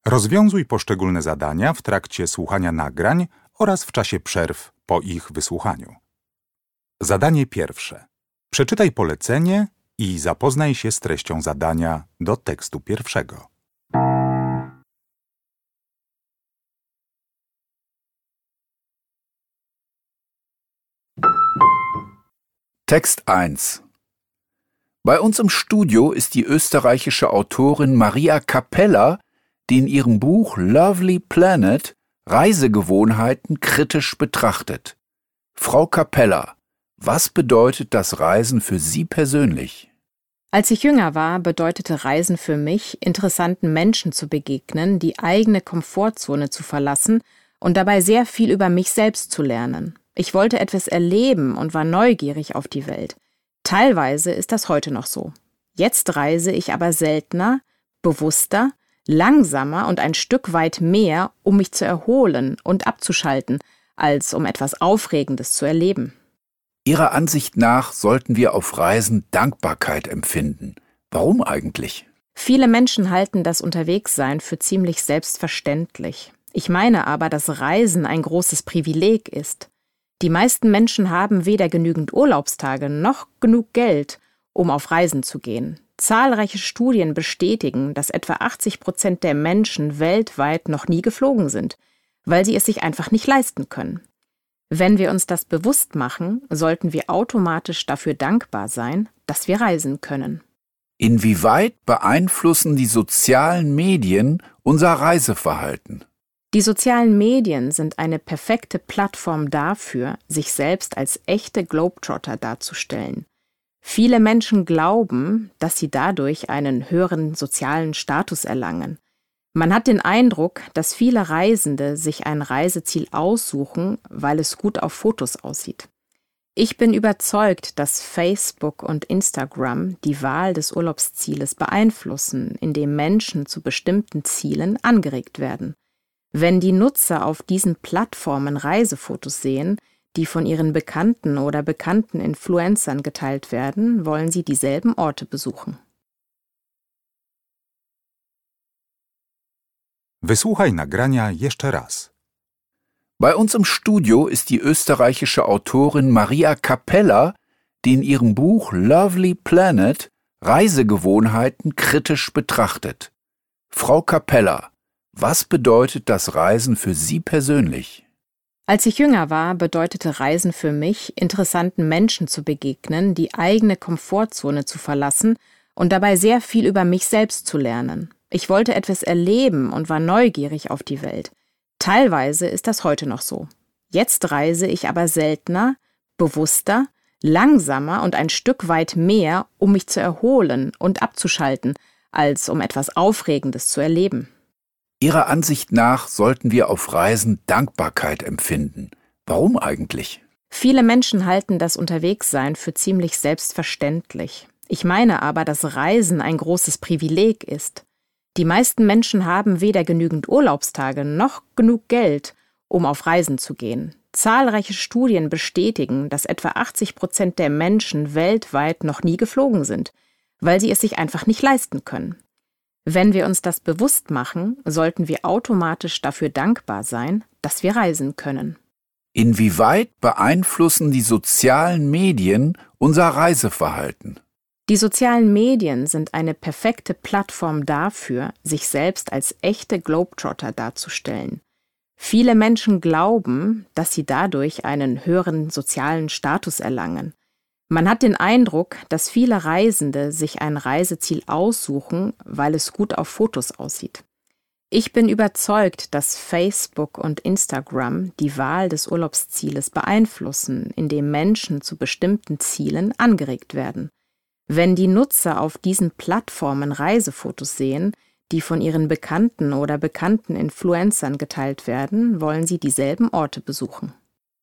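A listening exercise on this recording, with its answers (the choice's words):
W zadaniach 1.1. i 1.2. zaznacz jedną z liter: A, B albo C.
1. Was kann man aus der ersten Aussage von Maria Kapeller schlussfolgern?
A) Das Reisen macht ihr keinen Spaß mehr.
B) Beim Reisen steht für sie das Abenteuer im Vordergrund.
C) Ihre Einstellung zum Reisen hat sich mit der Zeit verändert.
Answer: Ihre Einstellung zum Reisen hat sich mit der Zeit verändert.

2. Welche Feststellung ist laut dem Text eine Tatsache und nicht nur eine Meinung?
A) Globetrotter haben einen höheren sozialen Status.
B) Die Mehrheit der Menschen ist noch nie mit dem Flugzeug gereist.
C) Die Wahl der Urlaubsziele wird durch die sozialen Medien inspiriert.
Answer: Die Mehrheit der Menschen ist noch nie mit dem Flugzeug gereist.

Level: Poziom: rozszerzony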